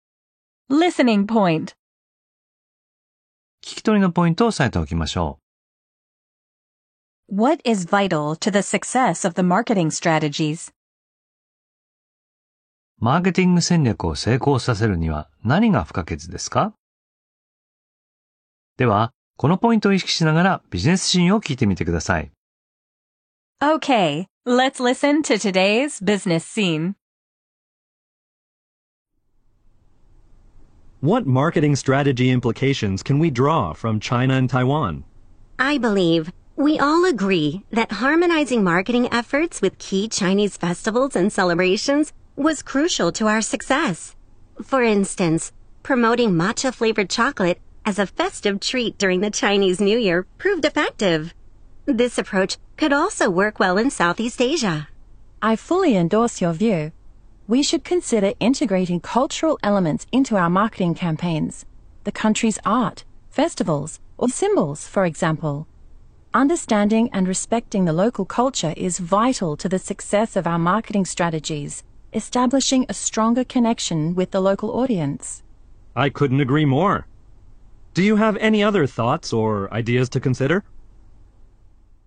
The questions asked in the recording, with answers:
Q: What is vital to the success of the marketing strategies?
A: Understanding and respecting the local culture.